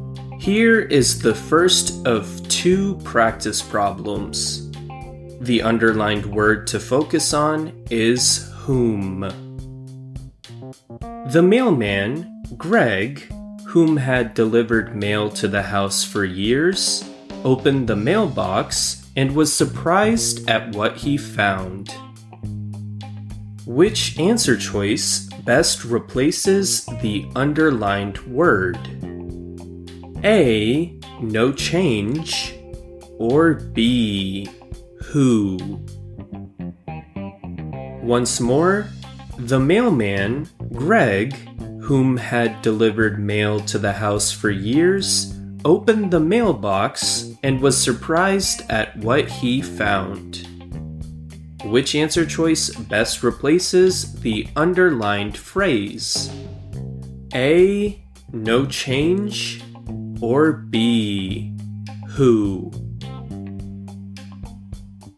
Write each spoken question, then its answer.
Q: Which answer choice best replaces the underlined word?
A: we should instead prefer answer choice B, who, to replace the whom